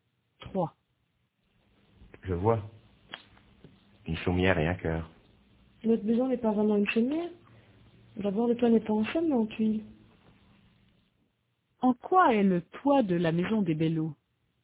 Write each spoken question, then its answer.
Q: En quoi est le toit de la maison des Bellots ?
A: En tuiles.